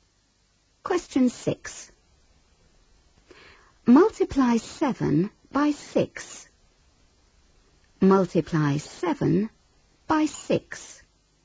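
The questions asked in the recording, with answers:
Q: Multiply 7 by 6.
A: 42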